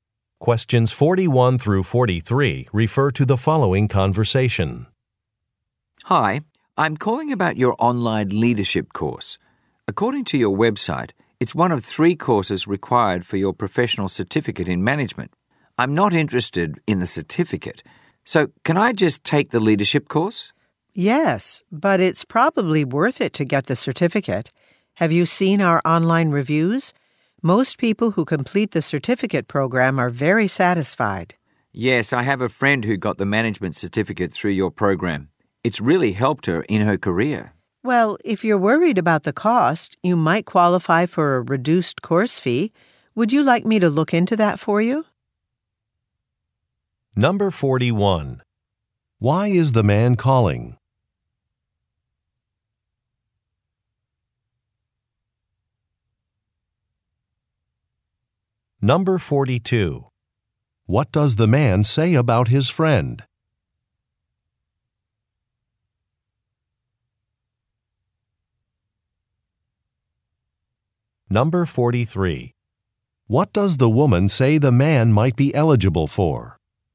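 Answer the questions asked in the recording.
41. To ask about taking the online leadership course without the certificate
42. She got the management certificate and it really helped her career
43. A reduced course fee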